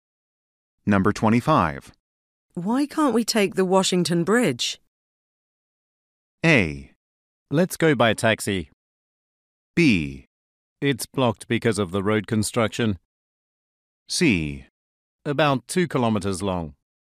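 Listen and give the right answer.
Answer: B: It's blocked because of the road construction.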